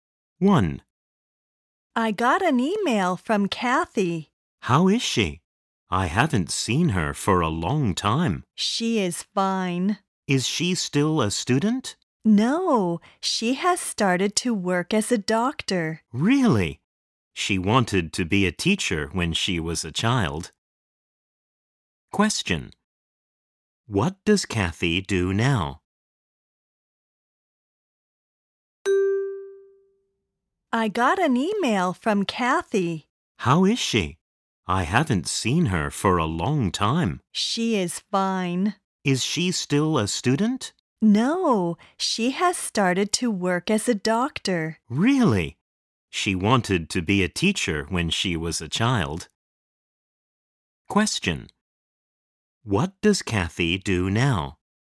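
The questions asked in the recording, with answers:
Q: What does Kathy do now?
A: She works as a doctor.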